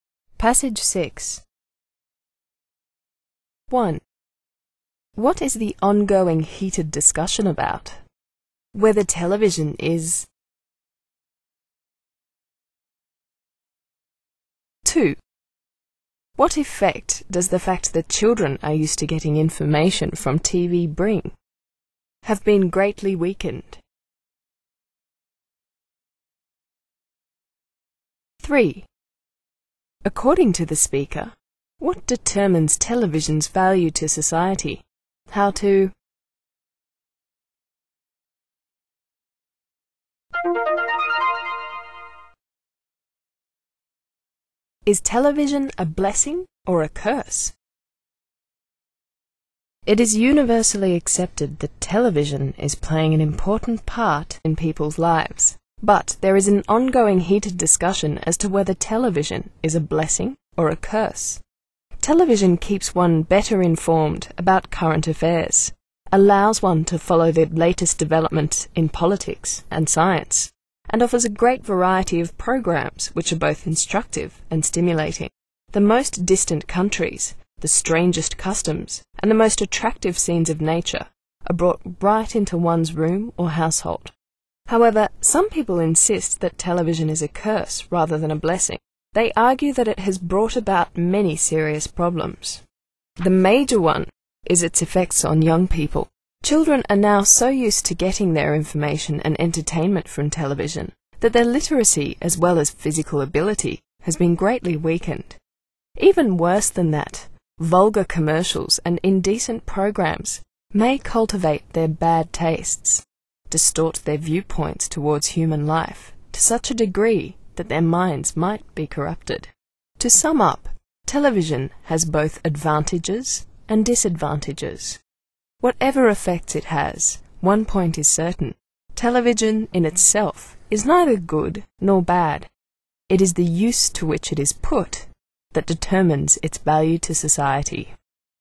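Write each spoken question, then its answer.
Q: What is the ongoing heated discussion about?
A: Whether television is a blessing or a curse

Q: What effect does the fact that children are used to getting information from TV bring?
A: Their literacy and physical ability have been greatly weakened

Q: According to the speaker, what determines television's value to society?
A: How it is used (the use to which it is put)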